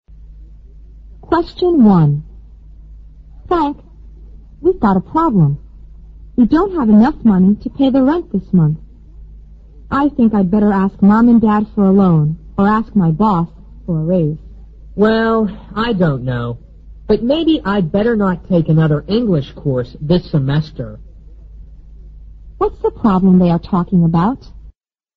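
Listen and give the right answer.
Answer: They don't have enough money to pay the rent this month.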